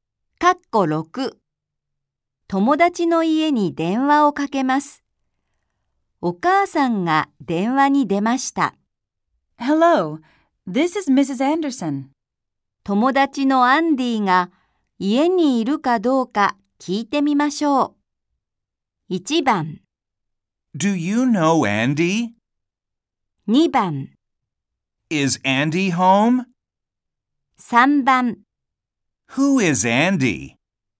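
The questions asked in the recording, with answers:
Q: 友達のアンディが家にいるかどうか聞いてみましょう。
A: 2: Is Andy home?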